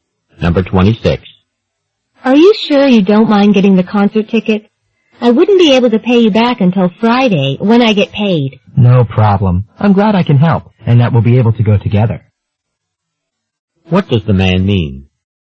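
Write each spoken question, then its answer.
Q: What does the man mean?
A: He is happy to buy her ticket and wait until Friday to be paid back.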